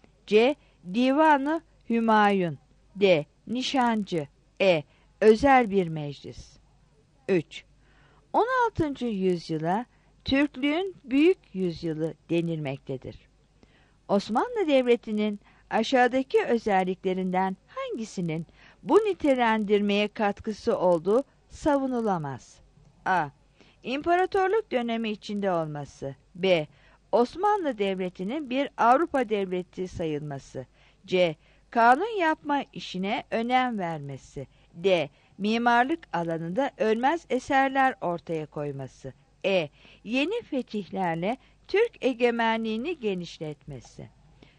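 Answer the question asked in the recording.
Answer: B: Osmanlı Devleti'nin bir Avrupa devleti sayılması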